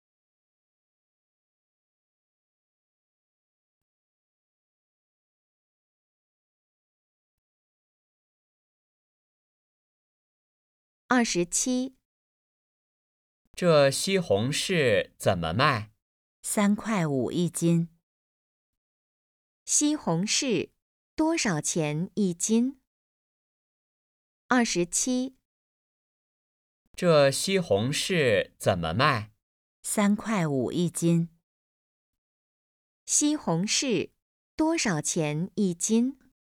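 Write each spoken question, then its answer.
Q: 西红柿多少钱一斤?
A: 三块五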